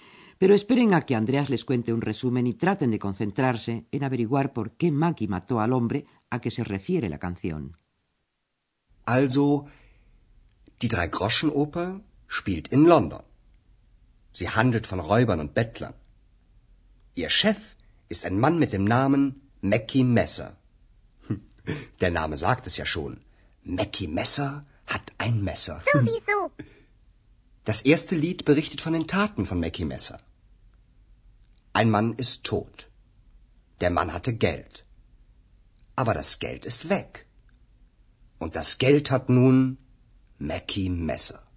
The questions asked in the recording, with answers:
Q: traten de concentrarse en averiguar por qué Maki mató al hombre a que se refiere la canción.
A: ¿Verdad que descubrieron que Mackie mató al hombre porque el hombre tenía dinero?